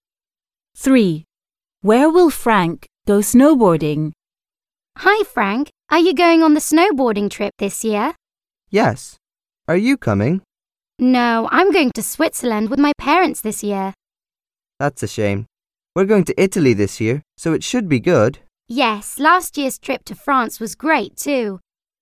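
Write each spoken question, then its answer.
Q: Where will Frank go snowboarding?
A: Italy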